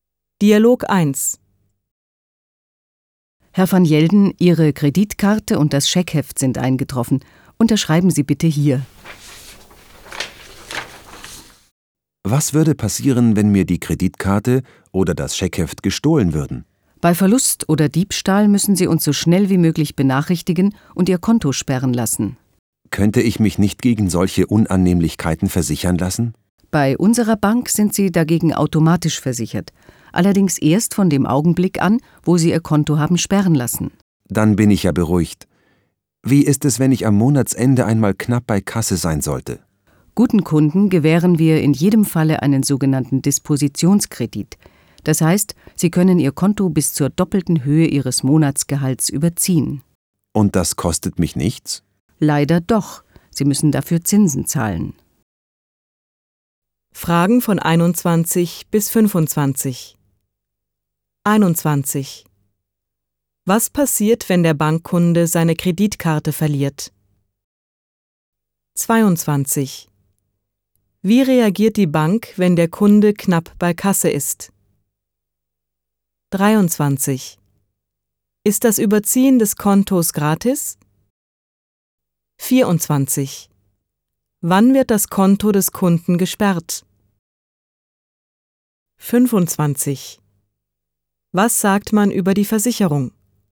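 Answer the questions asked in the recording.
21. Er muss die Bank schnell benachrichtigen und das Konto sperren lassen
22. Sie gewährt einen Dispositionskredit
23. Nein, man muss Zinsen zahlen
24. Bei Verlust oder Diebstahl, wenn der Kunde die Bank benachrichtigt
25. Man ist automatisch versichert, ab der Sperrung des Kontos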